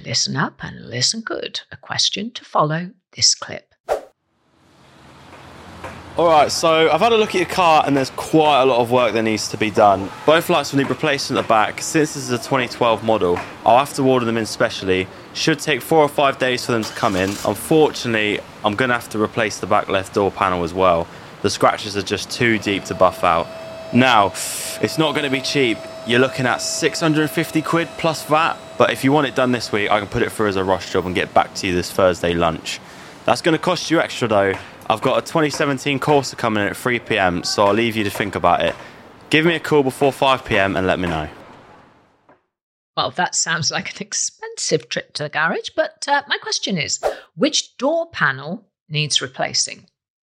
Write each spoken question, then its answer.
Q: which door panel needs replacing?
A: The answer I was looking for was the back left door panel.